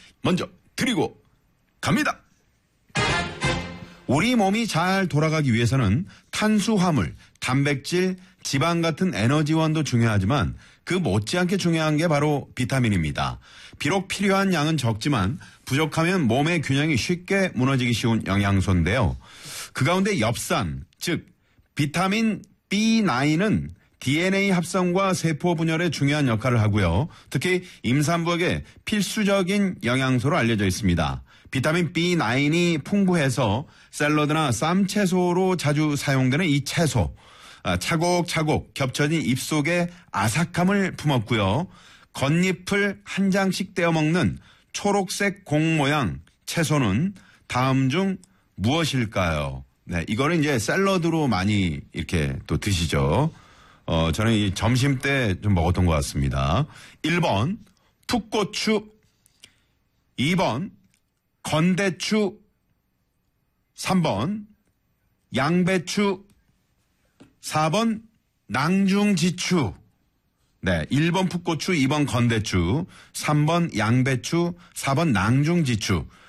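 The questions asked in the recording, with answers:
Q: 겉잎을 한 장씩 떼어 먹는 초록색 공 모양 채소는 다음 중 무엇일까요?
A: 3: 양배추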